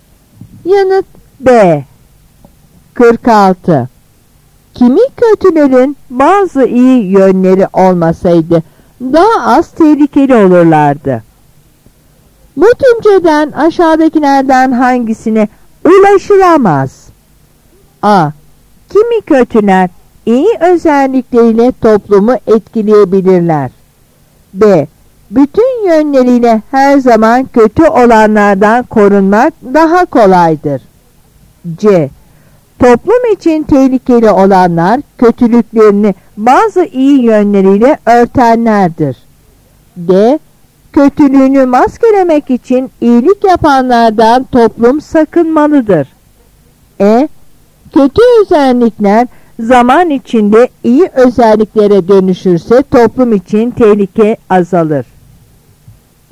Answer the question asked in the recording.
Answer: Yanıt E.